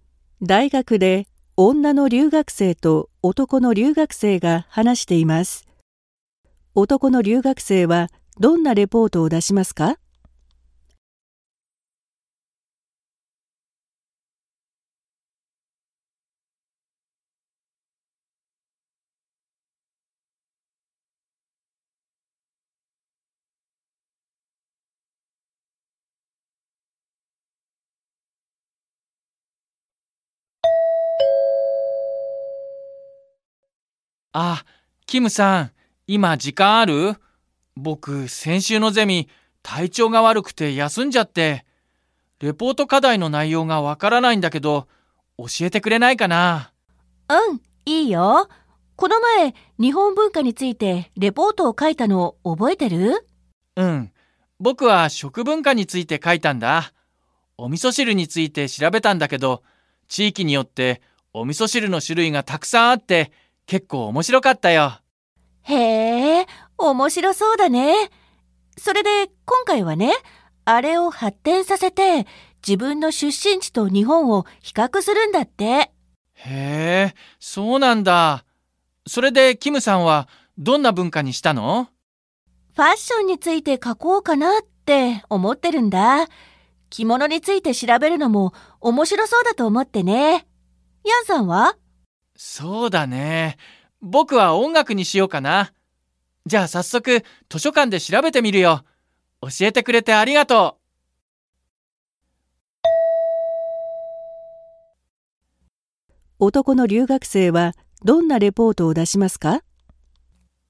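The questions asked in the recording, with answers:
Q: 男の留学生はどんなレポートを出しますか?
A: 自分の出身地と日本の音楽を比較するレポート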